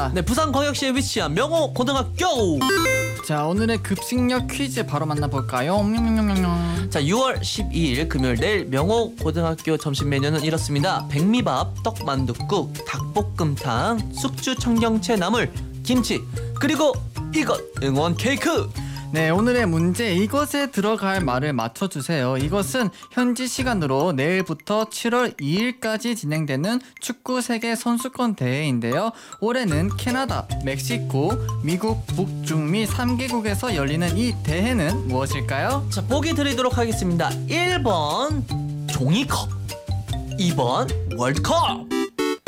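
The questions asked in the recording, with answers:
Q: 올해는 캐나다, 멕시코, 미국, 북중미 3개국에서 열리는 이 대회는 무엇일까요?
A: 2: 월드컵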